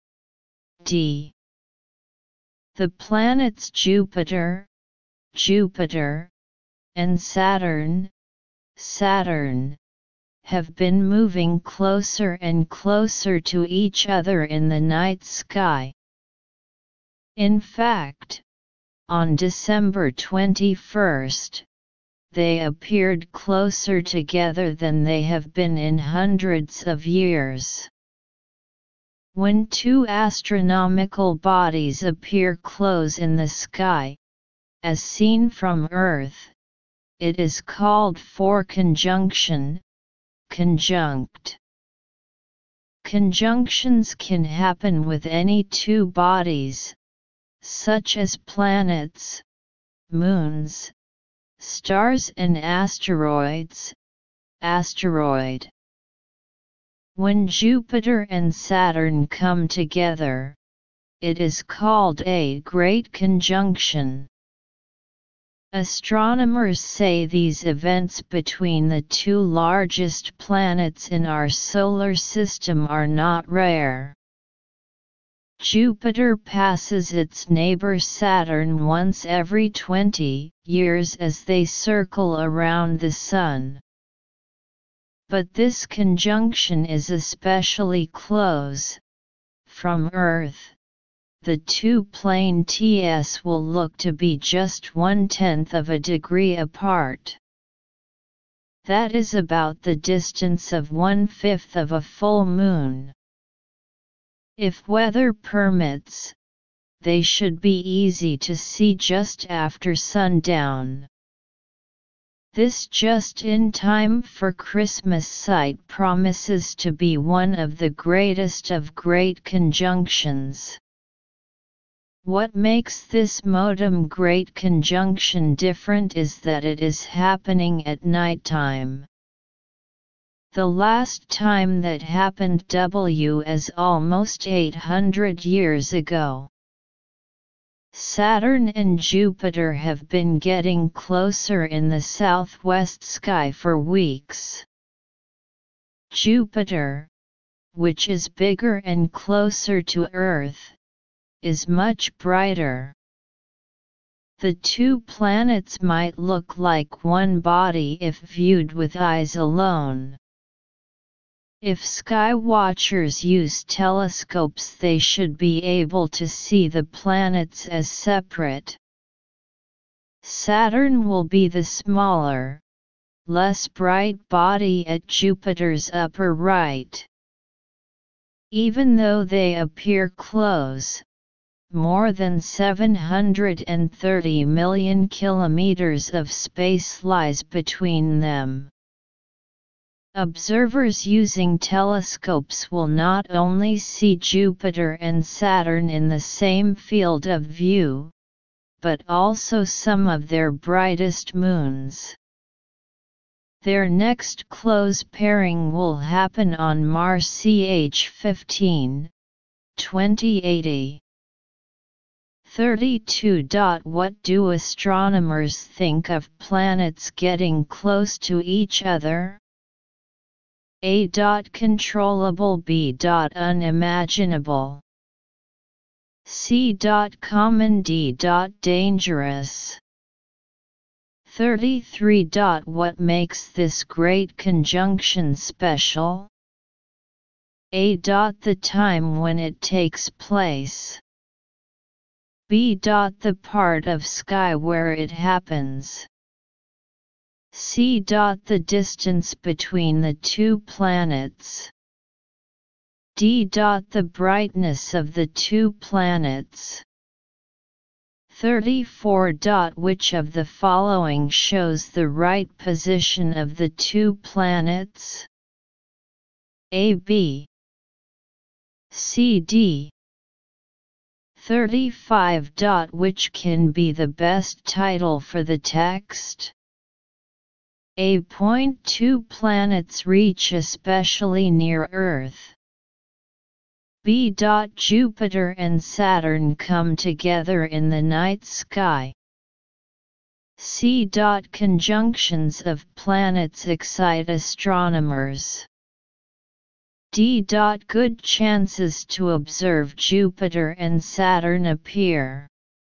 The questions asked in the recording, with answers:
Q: What do astronomers think of planets getting close to each other?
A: Answer 32. C.

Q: What makes this great conjunction special?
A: 33. A.

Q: Which can be the best title for the text?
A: 35. B.